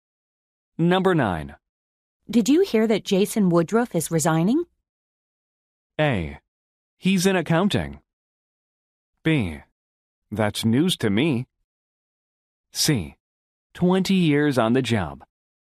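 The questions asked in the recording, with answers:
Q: Did you hear that Jason Woodruff is resigning?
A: B: That's news to me.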